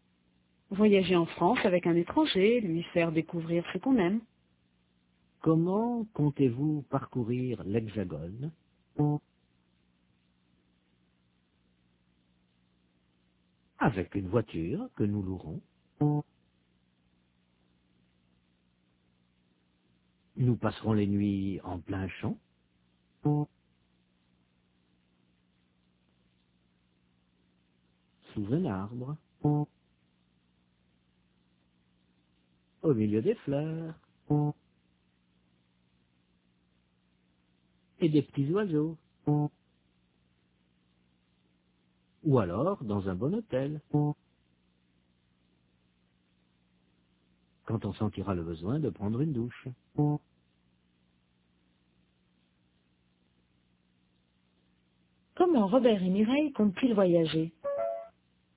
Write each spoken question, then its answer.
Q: Comment Robert et Mireille comptent-ils voyager ?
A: Avec une voiture qu'ils loueront.